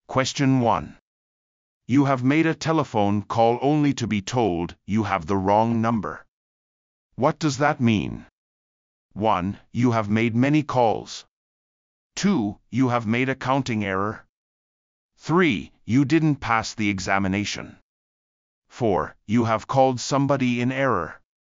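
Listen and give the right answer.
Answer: 4: You have called somebody in error.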